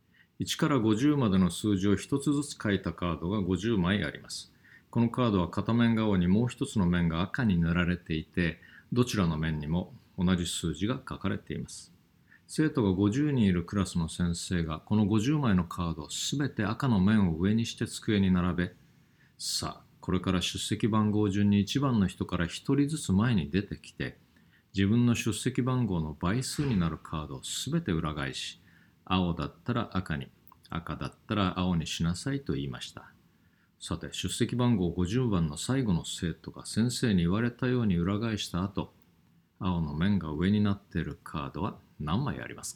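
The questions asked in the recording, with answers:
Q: さて、出席番号50番の最後の生徒が先生に言われたように裏返した後、青の面が上になっているカードは何枚ありますか?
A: 7枚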